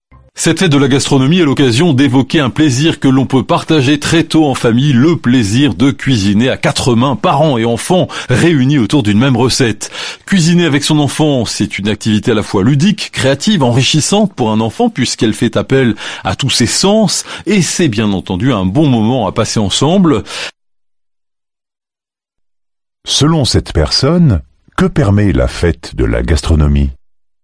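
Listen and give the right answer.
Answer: D'évoquer le plaisir de cuisiner en famille, parents et enfants ensemble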